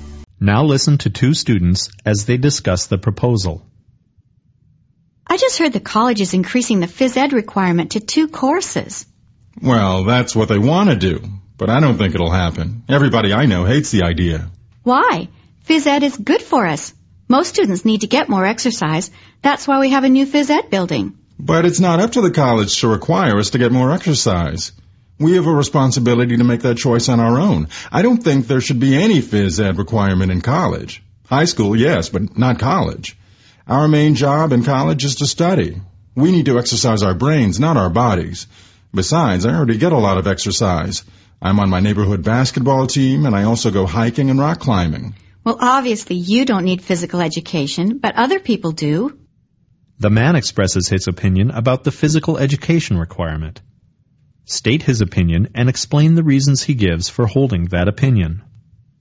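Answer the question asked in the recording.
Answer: He opposes any phys ed requirement in college: students should choose to exercise on their own, their main job in college is to study (exercise brains, not bodies), and he already gets plenty of exercise (basketball, hiking, rock climbing).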